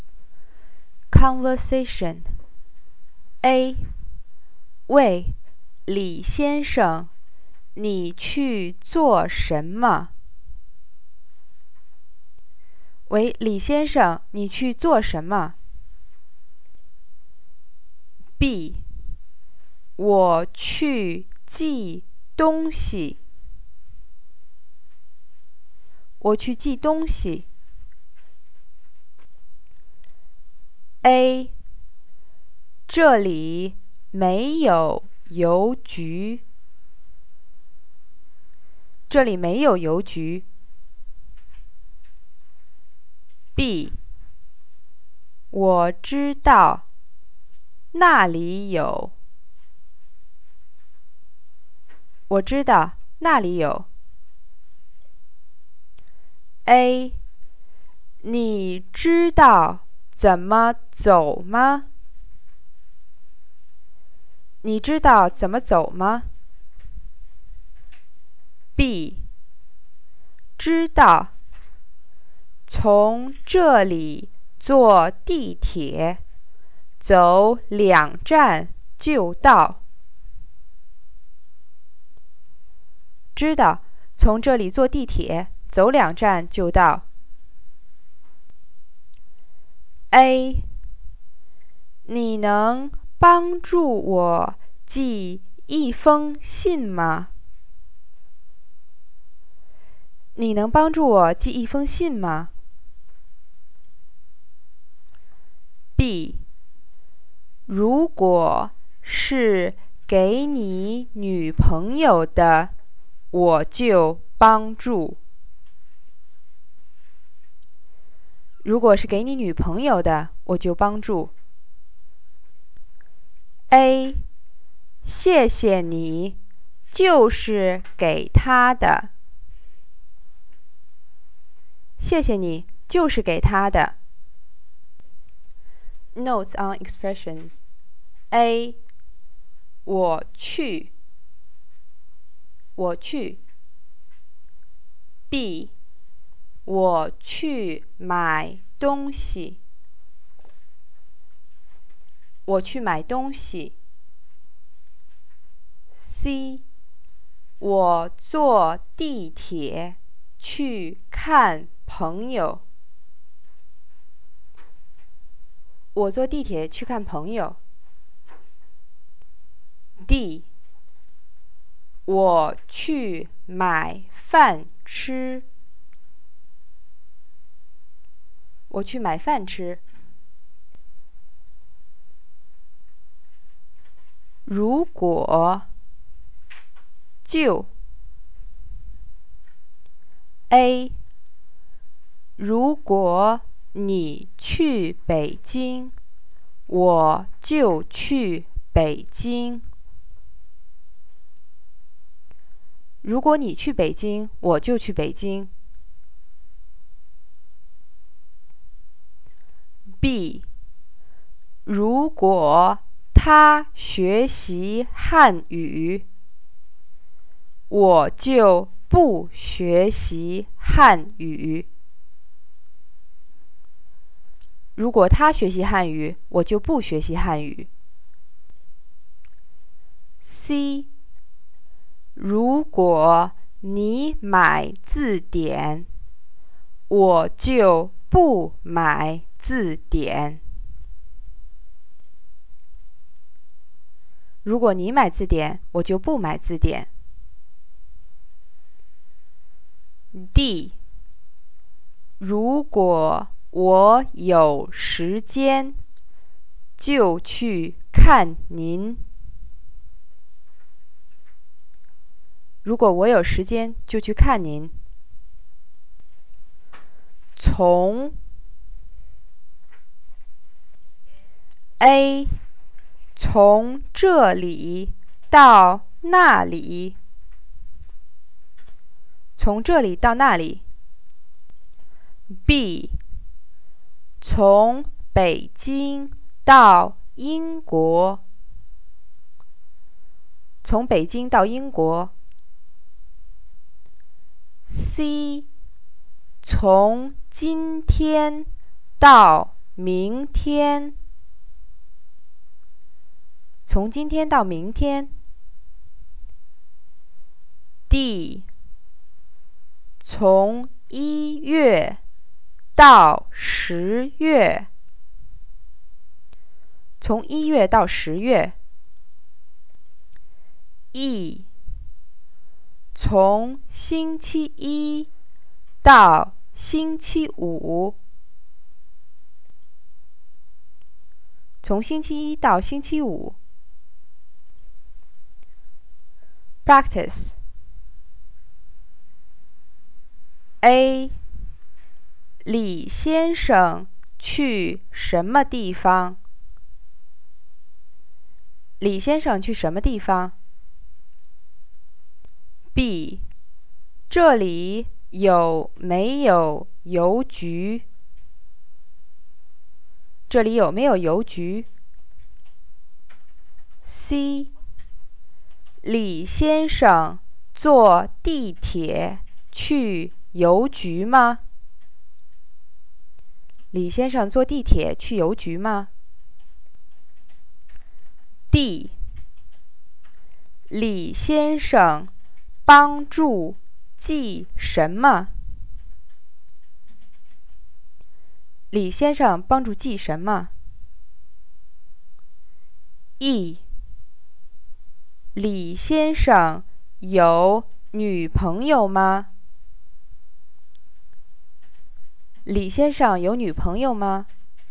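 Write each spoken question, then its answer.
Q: 李先生去什么地方?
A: 去邮局寄东西

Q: 这里有没有邮局?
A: 没有

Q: 李先生坐地铁去邮局吗?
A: 是,坐地铁走两站就到

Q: 李先生帮助寄什么?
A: 一封信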